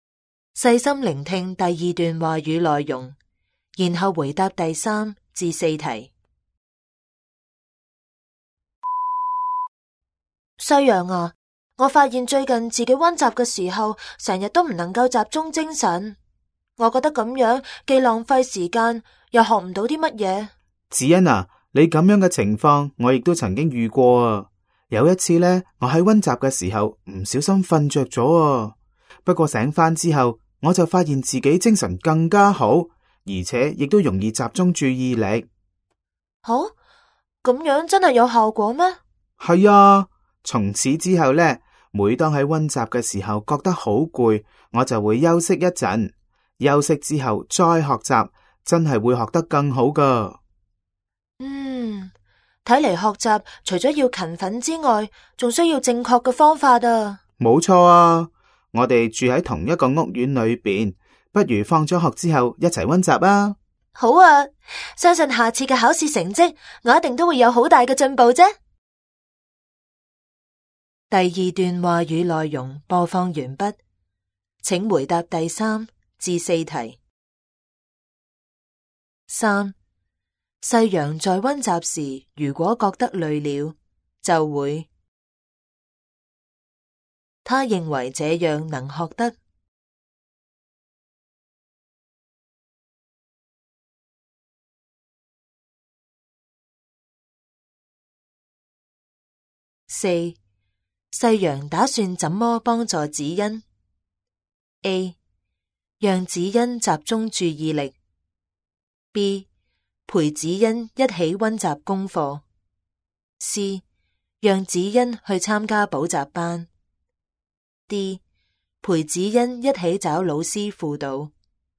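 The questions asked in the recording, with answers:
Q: 三,世阳在温习时如果觉得累了就会,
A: 休息一阵

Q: 他认为这样能学得。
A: 更好

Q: 四,世阳打算怎么帮助子欣?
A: B: 陪子欣一起温习功课。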